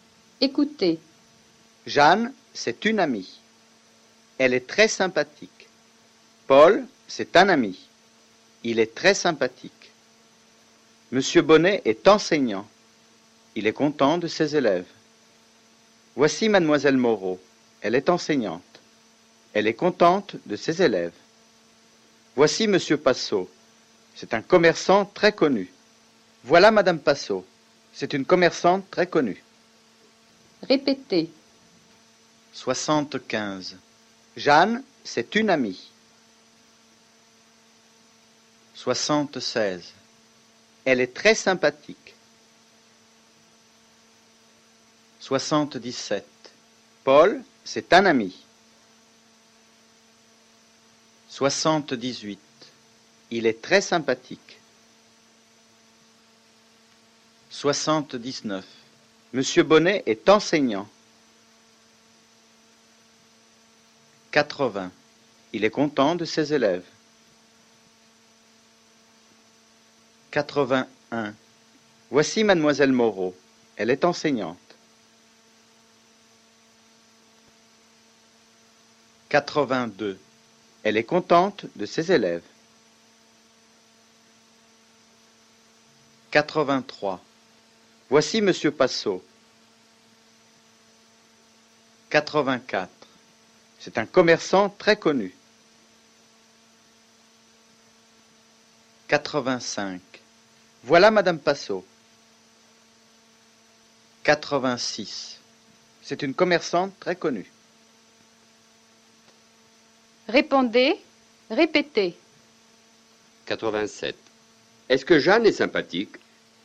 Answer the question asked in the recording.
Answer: Oui, elle est très sympathique.